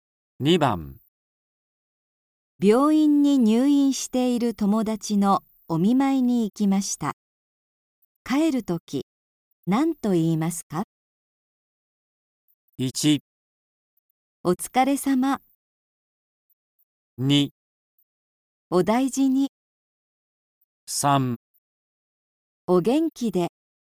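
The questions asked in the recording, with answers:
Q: 病院に入院している友達のお見舞いに行きました。帰るとき、何と言いますか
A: 2: お大事に。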